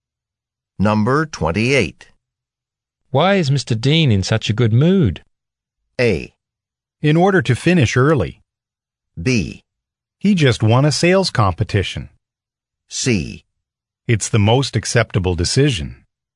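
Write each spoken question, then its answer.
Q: Why is Mr. Dean in such a good mood?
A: B: He just won a sales competition.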